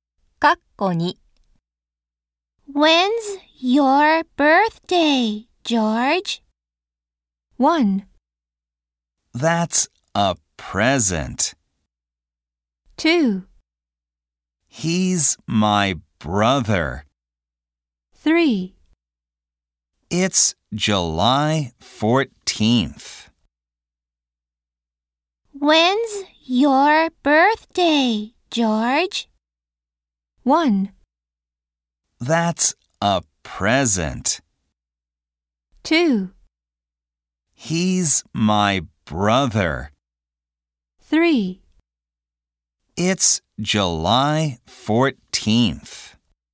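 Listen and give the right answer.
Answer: 3: It's July 14th.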